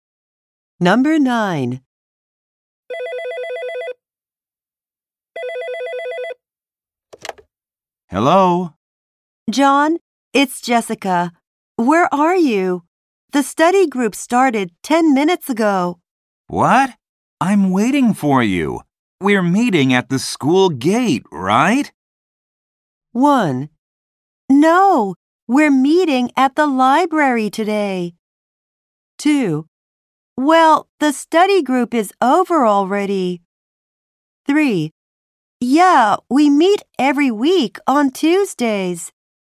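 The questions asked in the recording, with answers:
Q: We're meeting at the school gate, right?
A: 1: No, we're meeting at the library today.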